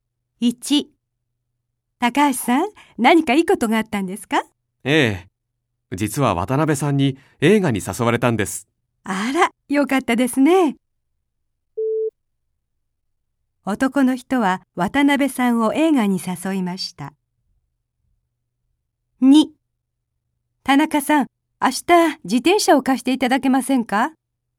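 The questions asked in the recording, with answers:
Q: 男の人は渡辺さんを映画に誘いました。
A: いいえ(間違い)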